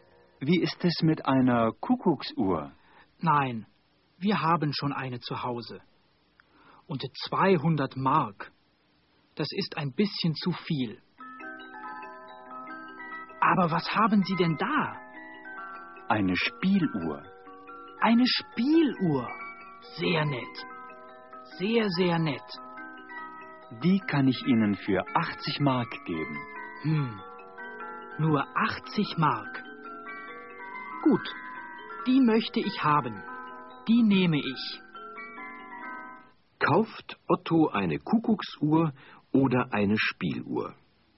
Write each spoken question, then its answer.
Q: Kauft Otto eine Kuckucksuhr oder eine Spieluhr?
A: Er kauft eine Spieluhr.